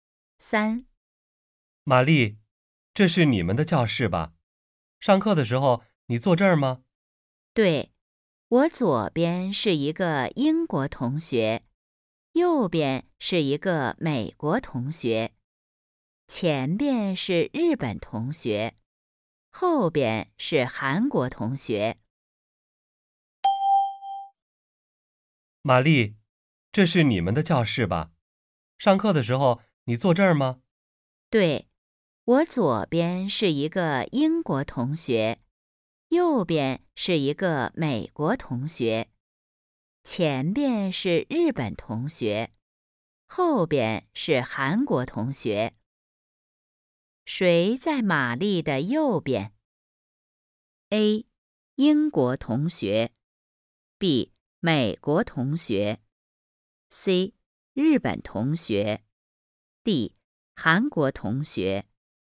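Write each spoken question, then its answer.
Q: 谁在玛丽的右边?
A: B: 美国同学。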